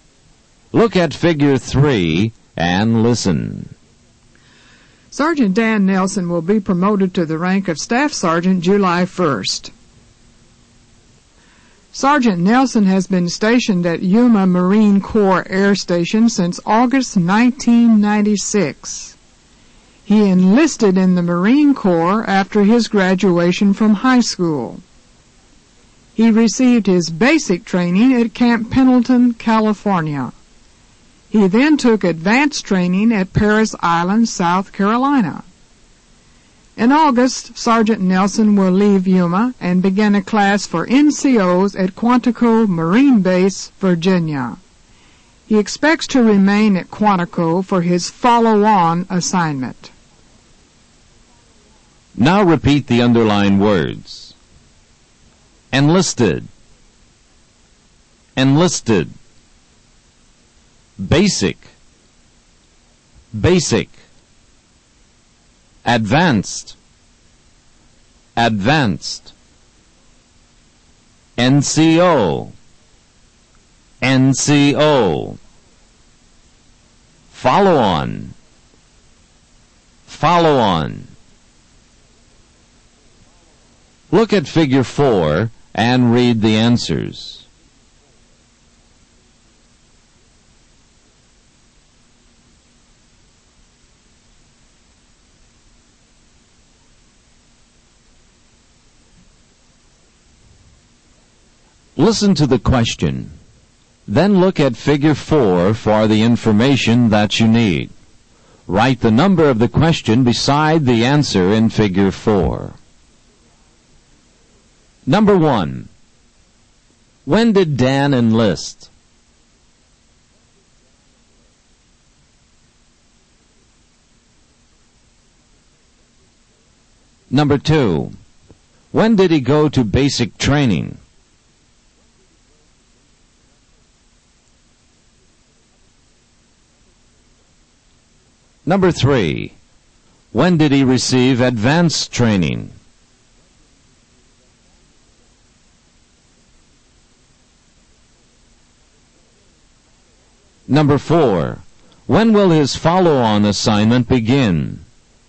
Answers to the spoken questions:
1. Dan enlisted after he graduated from high school.
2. He went to basic training after he joined the Marines.
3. Dan received advanced training after his basic training.
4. His follow-on assignment will begin when he completes the NCO class.